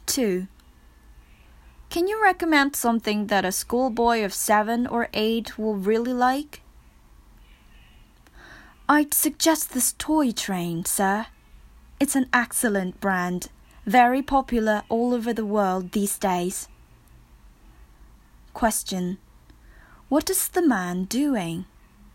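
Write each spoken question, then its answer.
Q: What is the man doing?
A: Buying a present (toy) for a schoolboy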